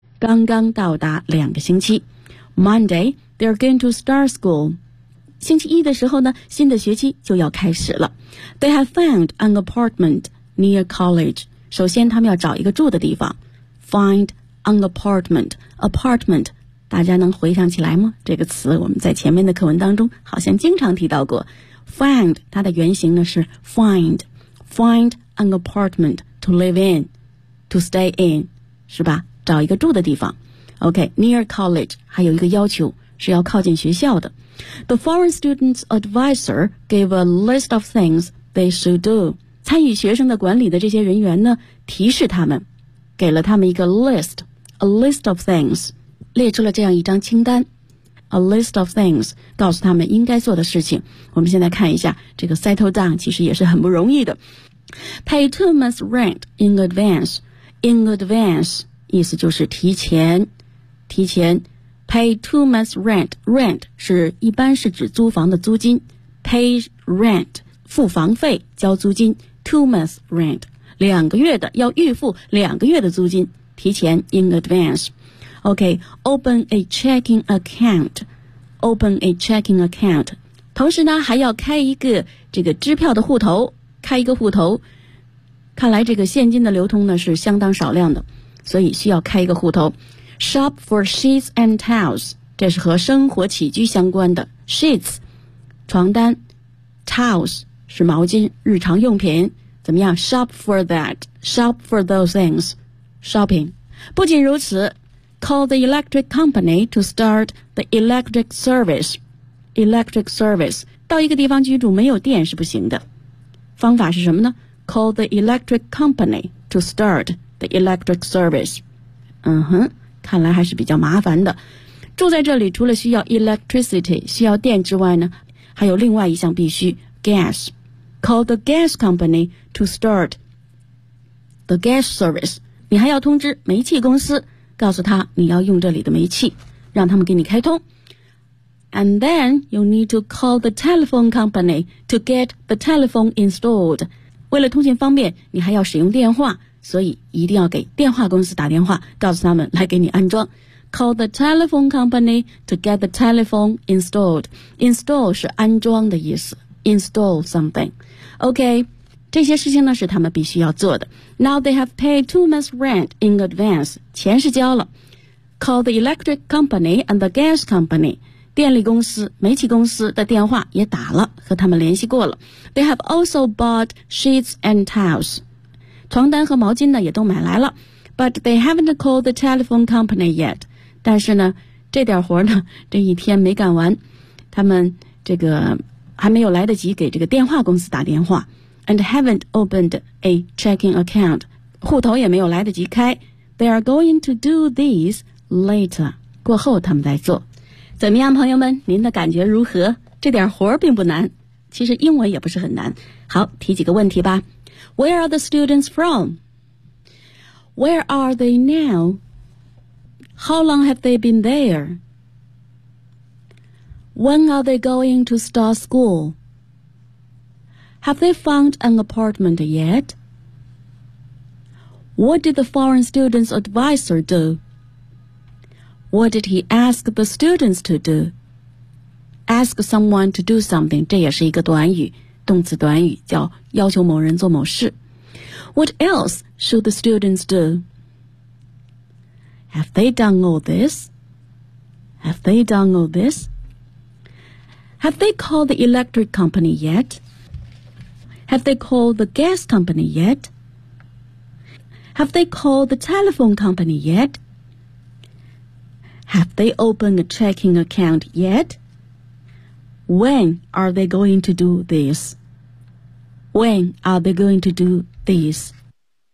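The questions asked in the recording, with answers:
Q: When are they going to start school?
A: On Monday.

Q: Have they found an apartment yet?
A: Yes, they have found an apartment near college.

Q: What did the foreign student's advisor do?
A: He gave them a list of things they should do.

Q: What did he ask the students to do?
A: Pay two months' rent in advance, open a checking account, shop for sheets and towels, and call the electric, gas and telephone companies.

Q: Have they done all this?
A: No, they haven't.

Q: Have they called the electric company yet?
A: Yes, they have.

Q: Have they called the gas company yet?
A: Yes, they have.

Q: Have they called the telephone company yet?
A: No, they haven't.

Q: Have they opened a checking account yet?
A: No, they haven't.

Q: When are they going to do this?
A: Later.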